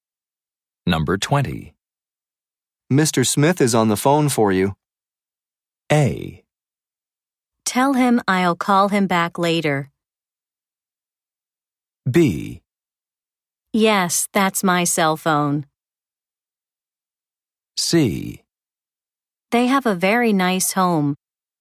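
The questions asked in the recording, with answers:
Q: Mr. Smith is on the phone for you.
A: A: Tell him I'll call him back later.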